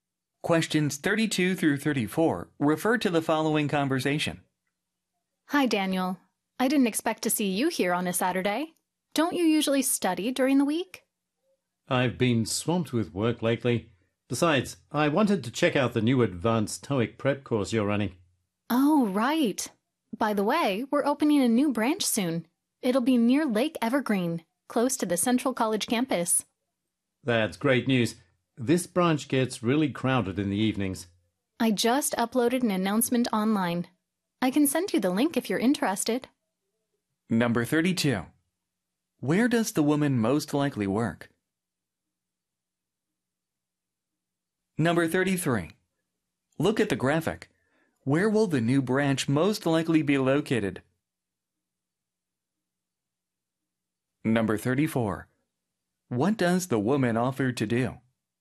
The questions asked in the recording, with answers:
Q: Where does the woman most likely work?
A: 바로 테스트 프레퍼레이션 센터죠.